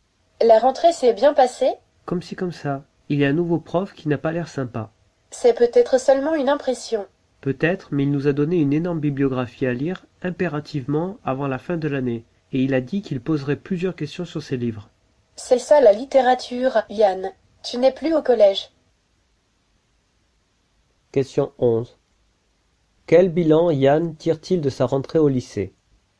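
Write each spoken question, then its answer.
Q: Quel bilan Yann tire-t-il de sa rentrée au lycée?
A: Un bilan mitigé (« comme si comme ça ») : un nouveau prof pas sympa, qui lui a donné une énorme bibliographie à lire.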